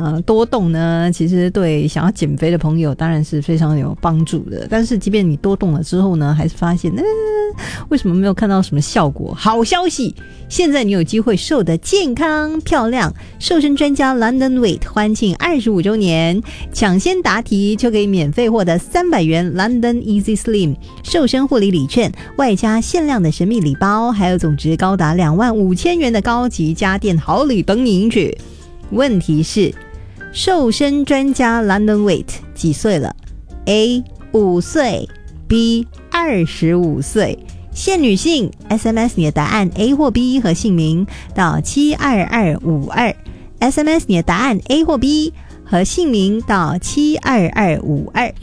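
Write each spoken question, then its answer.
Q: 问题是,瘦身专家 London Weight 几岁了?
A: B: 25岁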